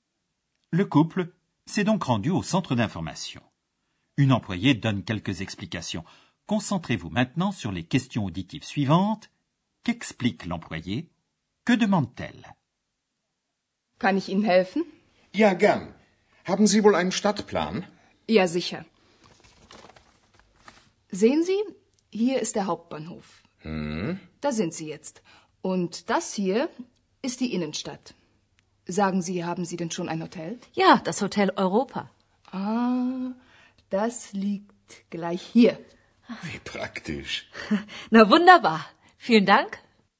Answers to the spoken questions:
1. L'employé explique sur le plan où se trouve le couple.
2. Et elle demande s'ils ont déjà un hôtel.